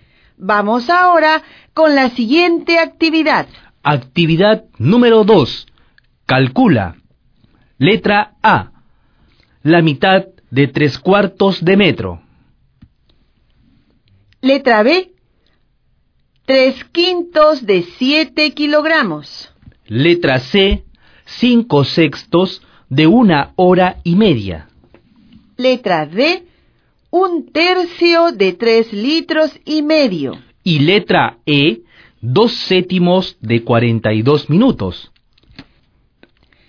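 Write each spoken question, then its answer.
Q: Letra C. 5/6 de 1 hora y media.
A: 1 hora y cuarto (75 minutos)

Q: Letra D, 1/3 de 3.5 litros.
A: 7/6 de litro (1 entero 1/6 litros)

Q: Y letra E, 2/7 de 42 minutos.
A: 12 minutos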